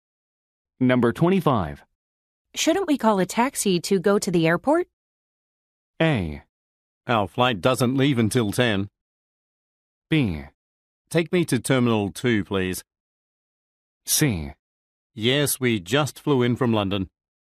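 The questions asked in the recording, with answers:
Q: Shouldn't we call a taxi to go to the airport?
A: A: Our flight doesn't leave until 10.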